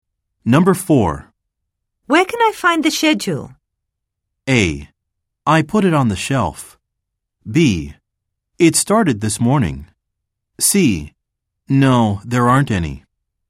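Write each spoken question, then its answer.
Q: Where can I find the schedule?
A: A: I put it on the shelf.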